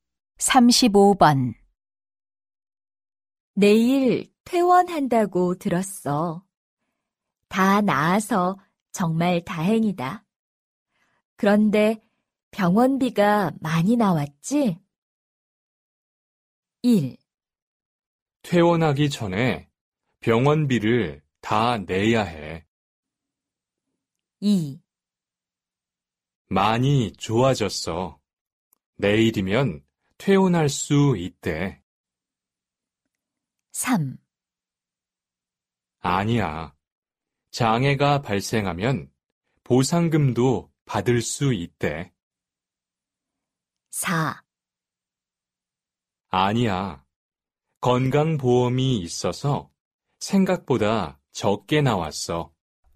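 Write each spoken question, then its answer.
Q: 그런데 병원비가 많이 나왔지?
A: 4: 아니야. 건강보험이 있어서 생각보다 적게 나왔어.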